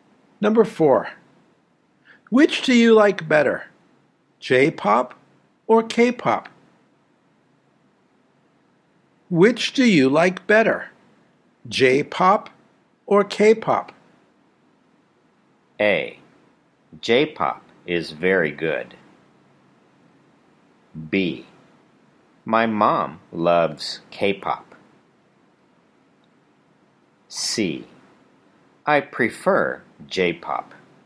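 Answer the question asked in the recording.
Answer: C: I prefer J-pop.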